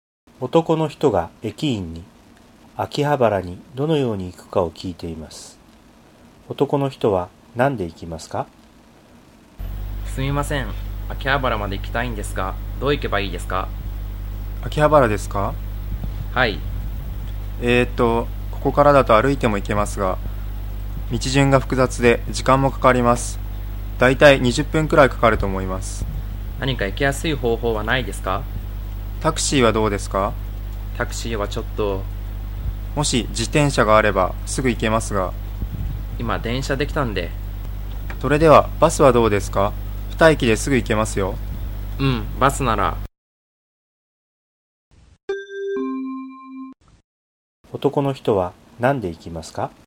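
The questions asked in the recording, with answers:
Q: 男の人は何で行きますか?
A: バス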